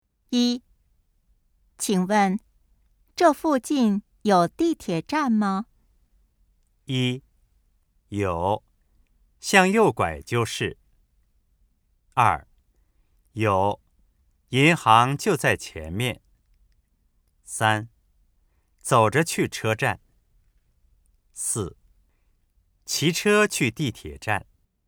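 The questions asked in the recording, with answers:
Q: 请问这附近有地铁站吗?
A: 一: 有,向右拐就是。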